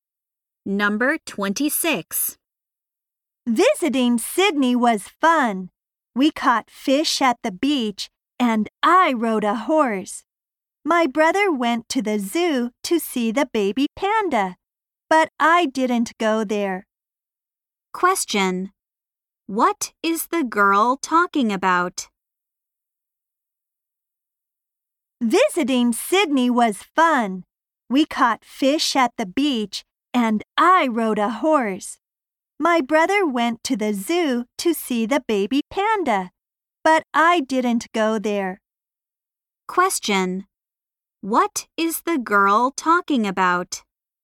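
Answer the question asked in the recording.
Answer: Her trip to Sydney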